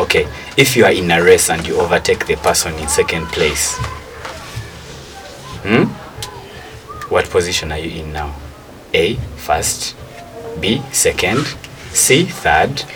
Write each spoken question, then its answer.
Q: what position are you in now?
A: The answer is second place to it.